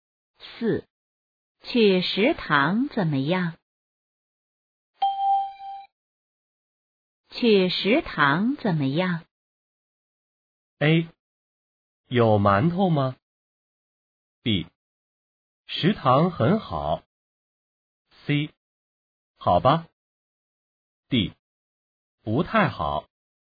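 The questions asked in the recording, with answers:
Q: 去食堂怎么样?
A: C: 好吧。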